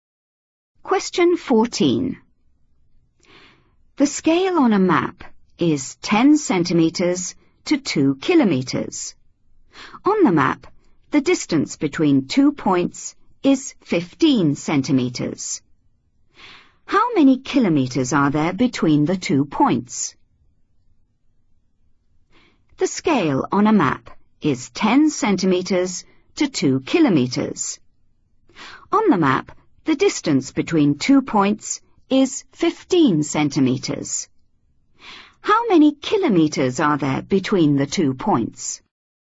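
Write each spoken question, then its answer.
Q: How many kilometers are there between the two points?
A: 3 km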